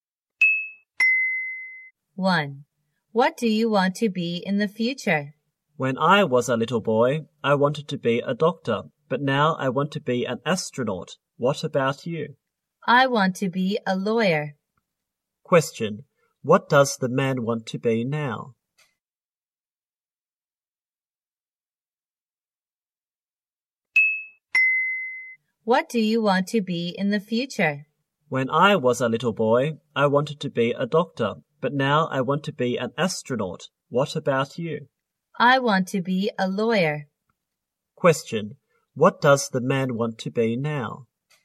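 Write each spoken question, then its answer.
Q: What does the man want to be now?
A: An astronaut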